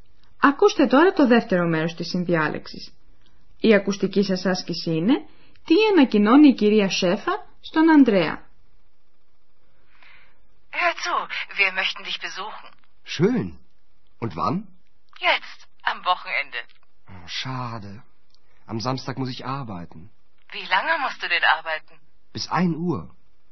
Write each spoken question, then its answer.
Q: τι ανακοινώνει η κυρία Σέφα στον Ανδρέα.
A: Η μητέρα του Ανδρέα του λέει ότι οι γονείς του θα βρίσκονται κοντά του, δηλαδή στο ξενοδοχείο, στο Aachen, το Σάββατο στη 1.